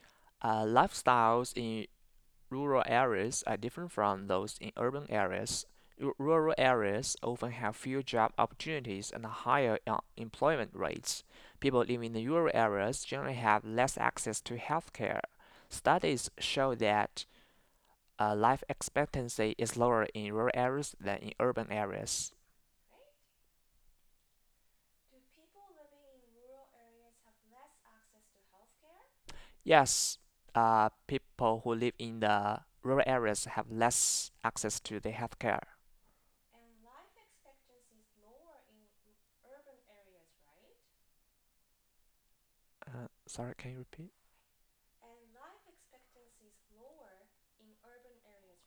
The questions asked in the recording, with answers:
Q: Do people living in rural areas have less access to healthcare?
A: Yes, people who live in the rural areas have less access to the healthcare.

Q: And life expectancy is lower in urban areas, right?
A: No, the lower life expectancy